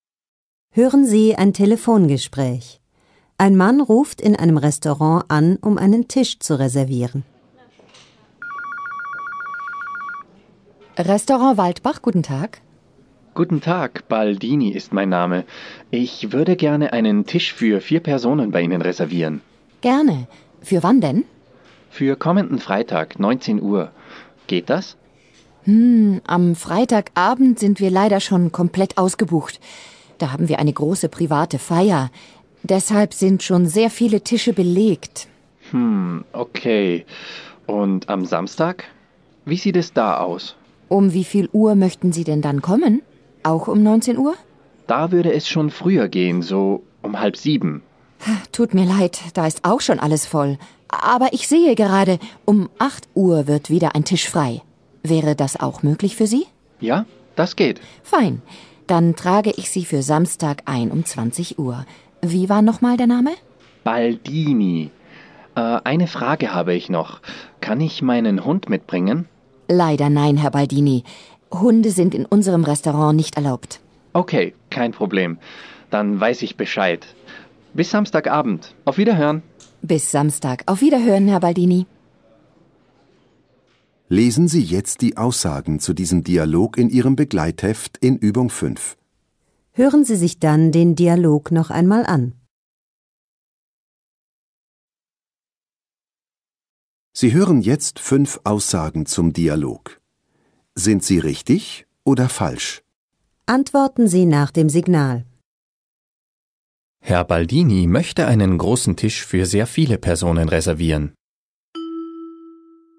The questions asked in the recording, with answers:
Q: Herr Baldini möchte einen großen Tisch für sehr viele Personen reservieren.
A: Falsch. Er möchte einen Tisch für 4 Personen reservieren.